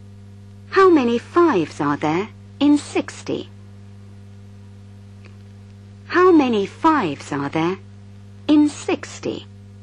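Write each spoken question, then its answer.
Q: How many fives are there in 60?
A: 12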